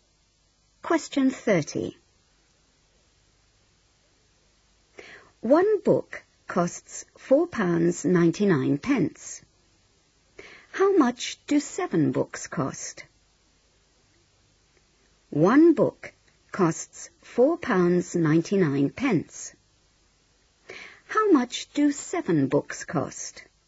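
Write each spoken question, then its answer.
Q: One book costs £4.99. How much do 7 books cost?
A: £34.93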